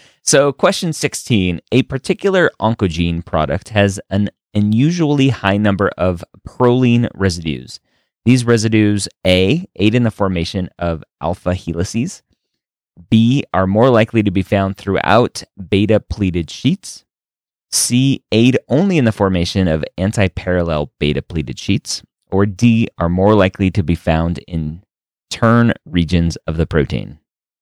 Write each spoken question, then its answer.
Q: a particular oncogene product has an unusually high number of proline residues.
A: the right answer there is D.